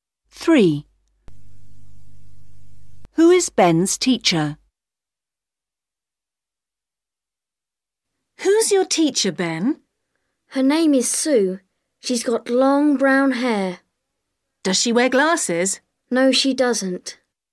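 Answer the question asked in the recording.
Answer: Sue, with long brown hair and no glasses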